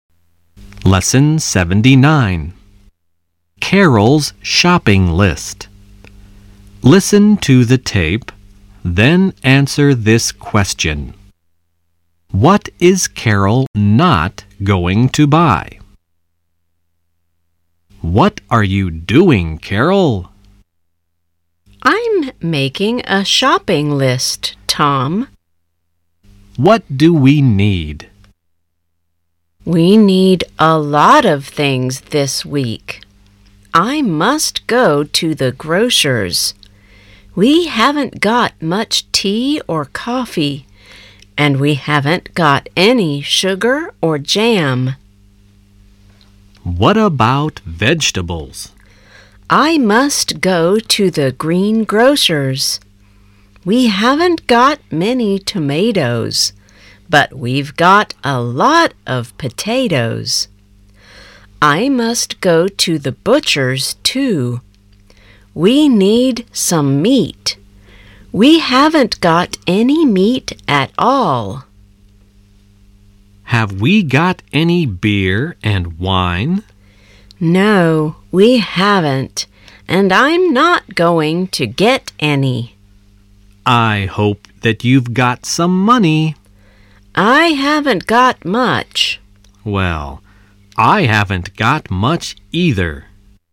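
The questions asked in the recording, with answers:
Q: What is Carol not going to buy?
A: Beer and wine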